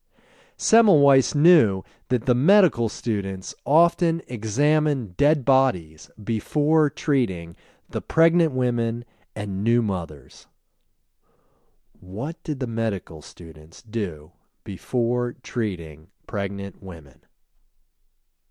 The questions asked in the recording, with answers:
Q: What did the medical students do before treating pregnant women?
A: The medical students examined dead bodies before treating the pregnant women.